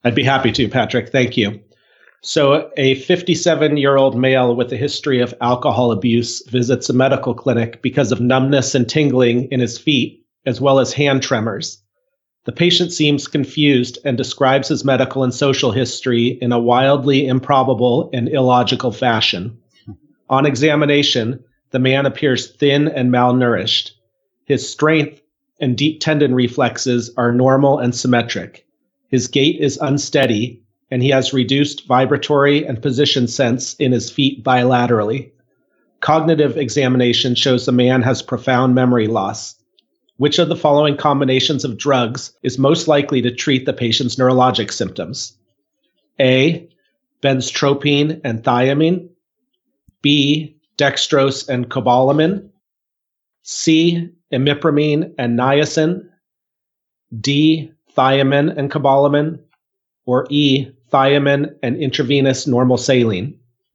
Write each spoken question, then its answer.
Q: Which of the following combinations of drugs is most likely to treat the patient's neurologic symptoms?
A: I'm going to go with option D, that he should have thiamine replacements and cobalamin